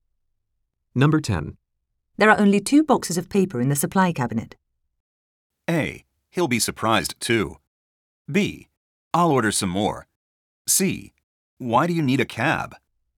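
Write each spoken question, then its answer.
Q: There are only 2 boxes of paper in the supply cabinet.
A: B: I'll order some more.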